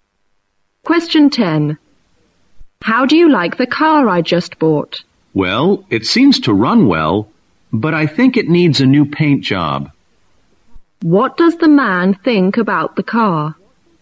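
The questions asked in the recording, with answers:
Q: What does the man think about the car?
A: It runs well but needs a new paint job.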